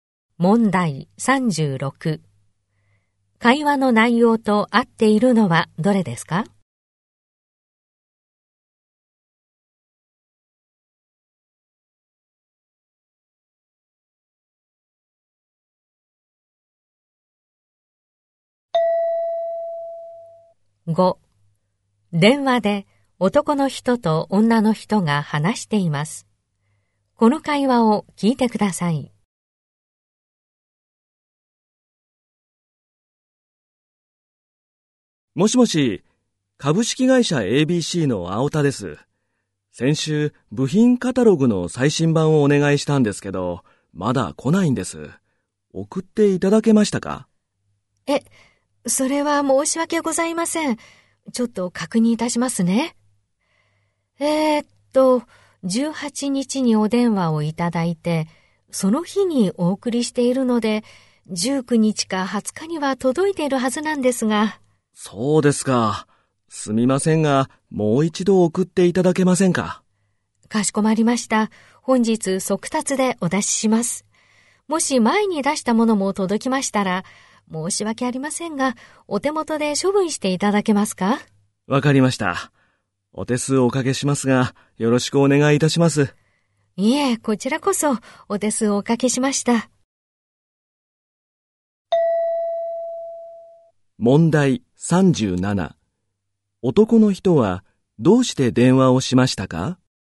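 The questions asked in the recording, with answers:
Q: 男の人はどうして電話をしましたか?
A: 頼んだ部品カタログがまだ届かないから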